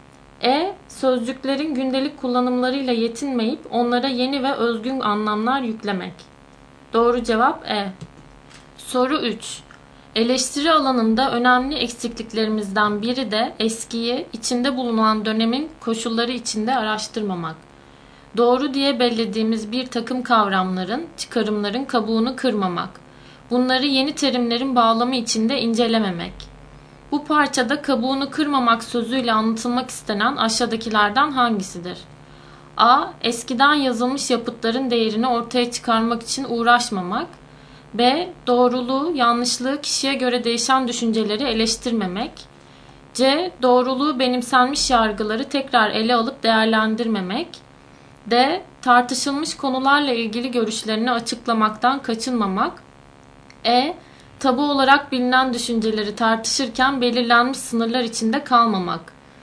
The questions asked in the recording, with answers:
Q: Bu parçada kabuğunu kırmamak sözüyle anlatılmak istenen aşağıdakilerden hangisidir?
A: Doğru cevap C.